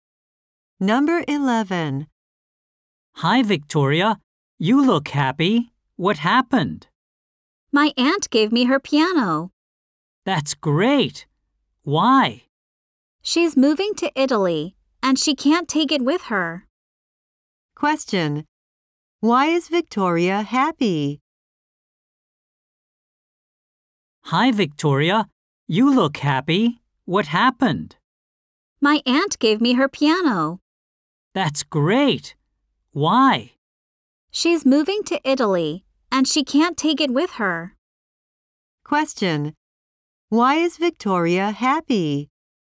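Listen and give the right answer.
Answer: Her aunt gave her a piano.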